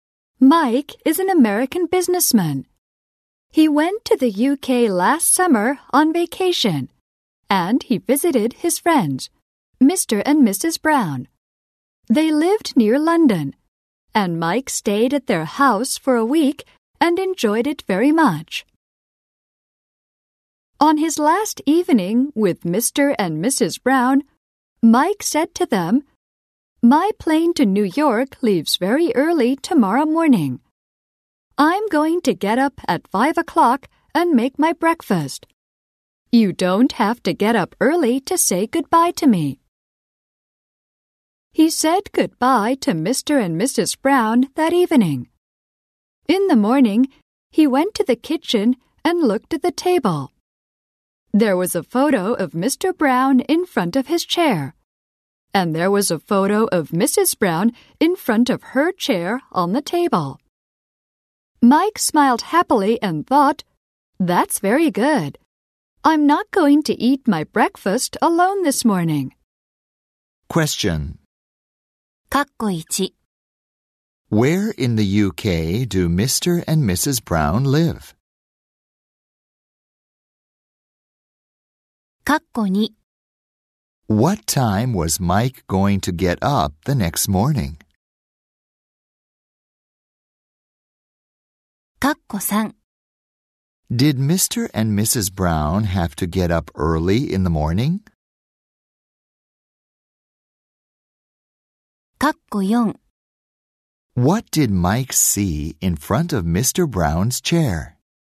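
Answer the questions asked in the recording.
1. Near London
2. At 5 o'clock
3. No, they didn't
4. A photo of Mr. Brown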